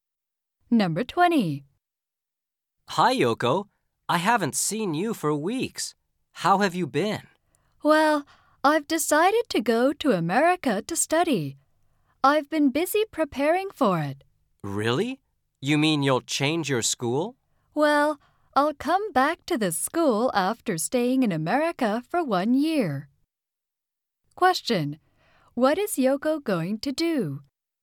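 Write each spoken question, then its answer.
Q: What is Yoko going to do?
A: Study in America for one year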